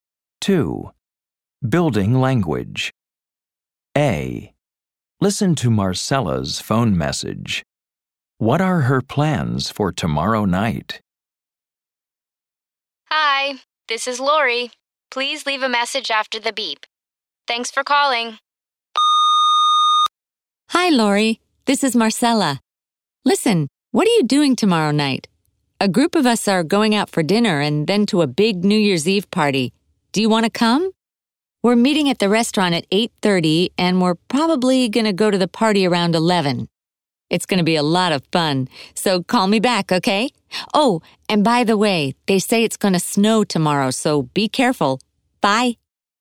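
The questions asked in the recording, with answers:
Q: What are her plans for tomorrow night?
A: Going out for dinner with a group, then to a big New Year's Eve party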